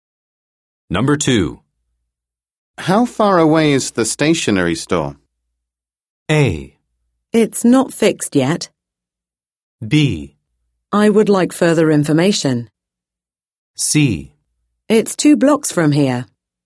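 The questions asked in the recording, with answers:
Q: How far away is the stationery store?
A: C: It's 2 blocks from here.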